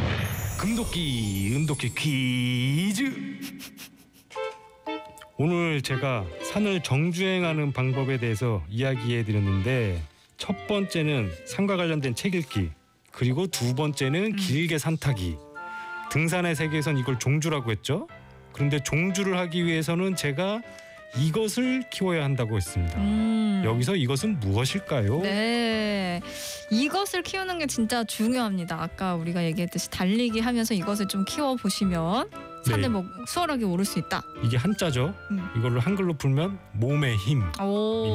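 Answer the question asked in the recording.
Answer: 체력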